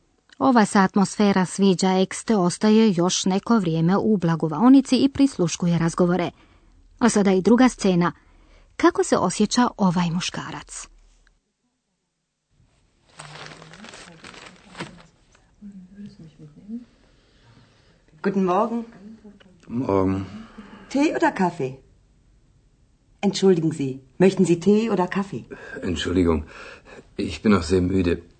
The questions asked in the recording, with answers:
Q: Kako se osjeća ovaj muškarac?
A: No, ovaj je čovjek na doručak stigao prilično pospan.